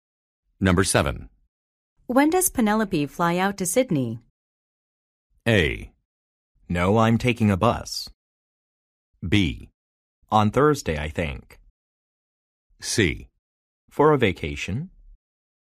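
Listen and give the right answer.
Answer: B: On Thursday, I think.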